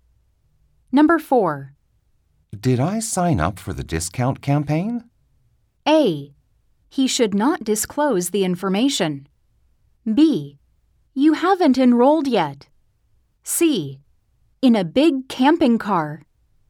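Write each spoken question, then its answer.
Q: Did I sign up for the discount campaign?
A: B: You haven't enrolled yet.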